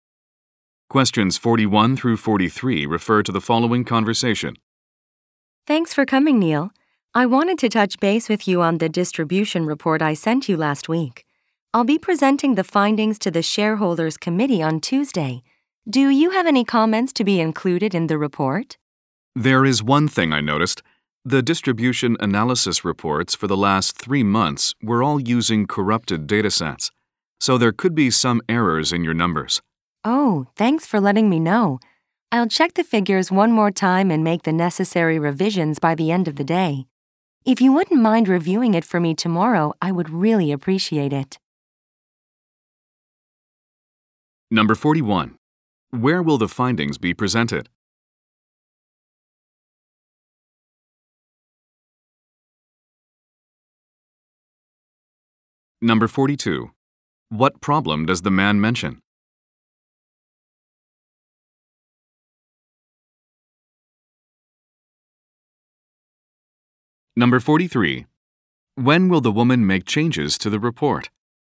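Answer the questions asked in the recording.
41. At the shareholders' committee
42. Corrupted datasets may have caused errors
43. By the end of the day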